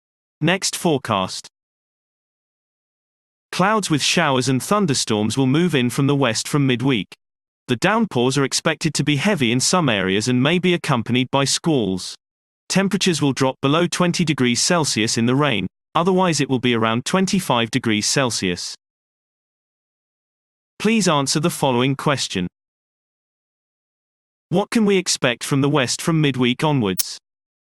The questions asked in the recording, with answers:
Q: What can we expect from the west from midweek onwards?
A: Clouds with showers and thunderstorms will move in from the west from midweek.